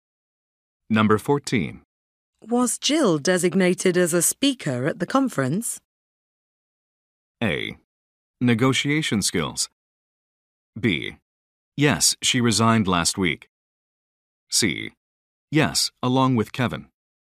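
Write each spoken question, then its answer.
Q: Was Jill designated as a speaker at the conference?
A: C: Yes, along with Kevin.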